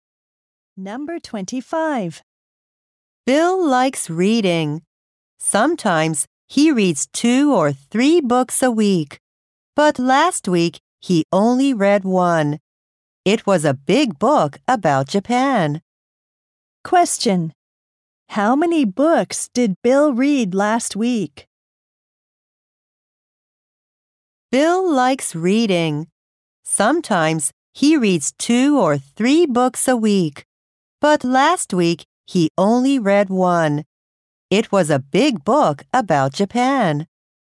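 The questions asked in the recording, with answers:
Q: Question. How many books did Bill read last week?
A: One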